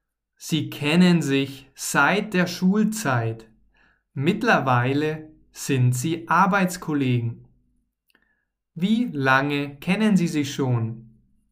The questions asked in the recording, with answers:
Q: Wie lange kennen Sie sich schon?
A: Sie kennen sich schon seit der Schulzeit.